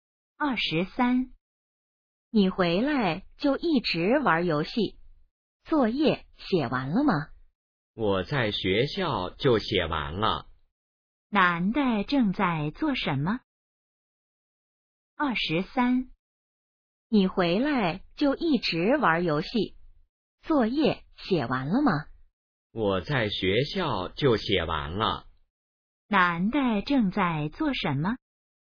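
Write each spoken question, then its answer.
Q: 男的正在做什么?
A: 玩游戏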